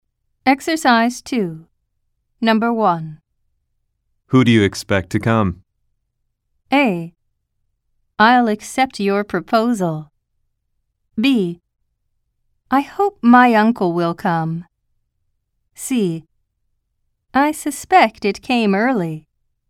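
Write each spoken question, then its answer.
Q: Who do you expect to come?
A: B: I hope my uncle will come.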